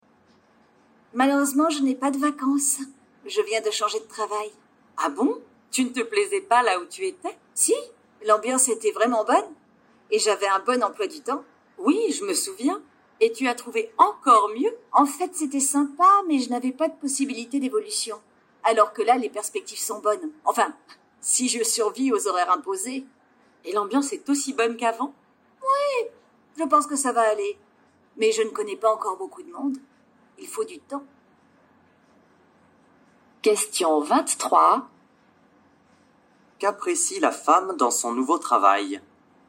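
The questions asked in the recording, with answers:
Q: Qu'apprécie la femme dans son nouveau travail?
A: Les perspectives d'évolution (les perspectives sont bonnes).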